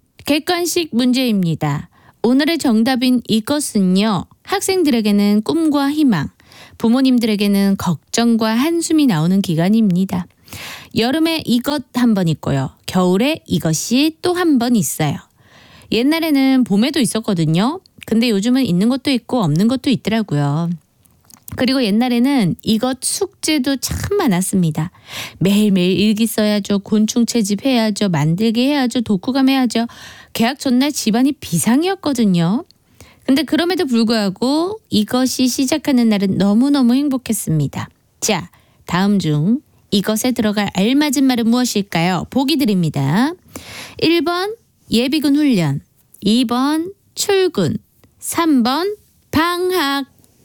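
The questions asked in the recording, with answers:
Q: 자, 다음 중 이것에 들어갈 알맞은 말은 무엇일까요?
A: 3: 방학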